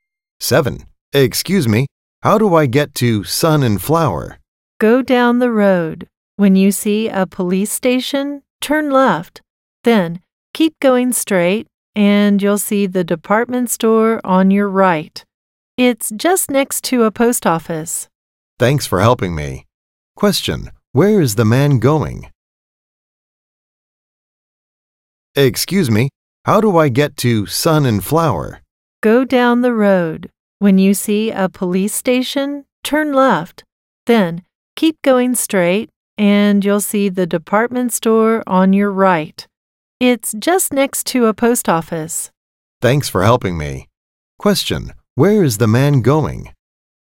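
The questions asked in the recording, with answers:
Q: where is the man going?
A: The department store Sun and Flower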